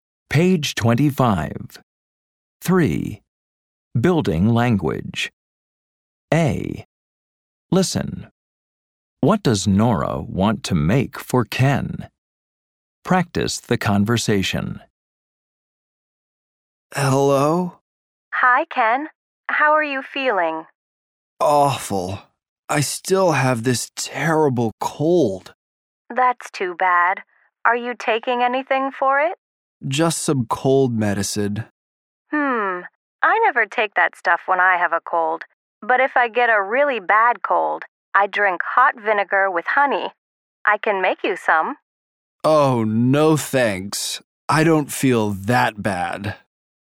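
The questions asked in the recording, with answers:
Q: What does Nora want to make for Ken?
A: Hot vinegar with honey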